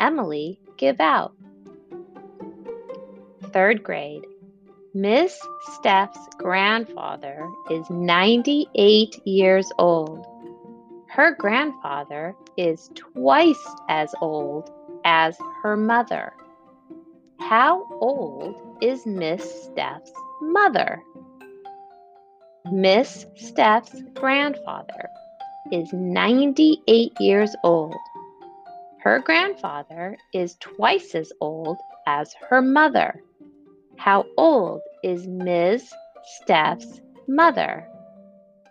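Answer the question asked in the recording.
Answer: 49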